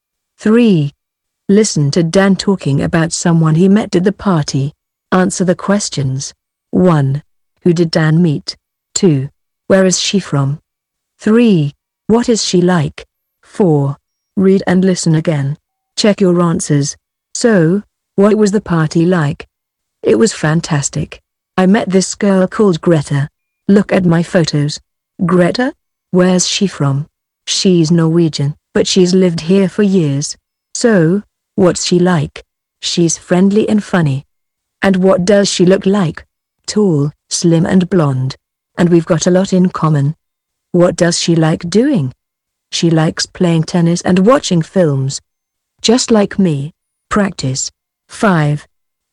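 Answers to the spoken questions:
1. Greta
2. Norway (she's Norwegian)
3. Friendly and funny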